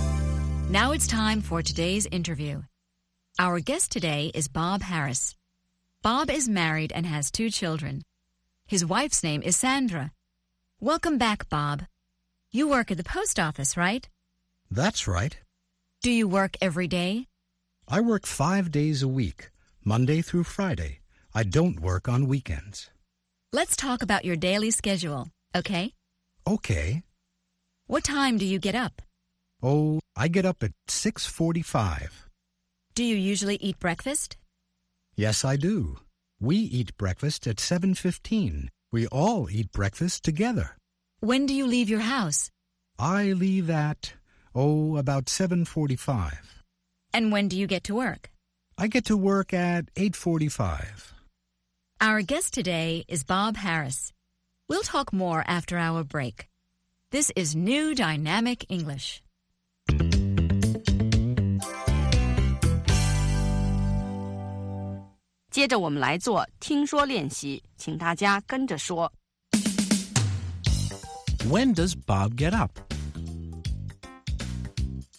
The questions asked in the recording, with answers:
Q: When does Bob get up?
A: He gets up at 6:45.